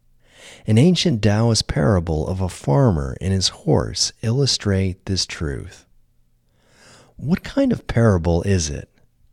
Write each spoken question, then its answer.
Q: What kind of parable is it?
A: It's an ancient Taoist parable of a farmer and his horse.